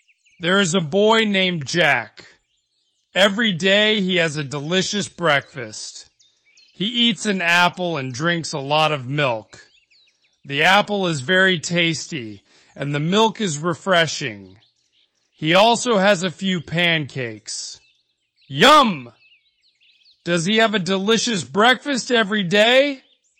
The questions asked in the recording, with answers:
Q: Does he have a delicious breakfast every day?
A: Yes, he does.